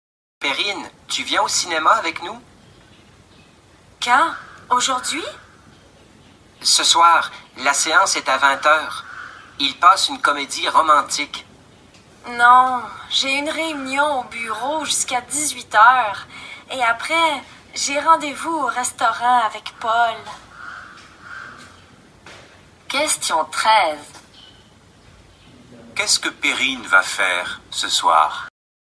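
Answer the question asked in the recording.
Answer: Elle va au restaurant avec Paul (après une réunion au bureau jusqu'à 18h).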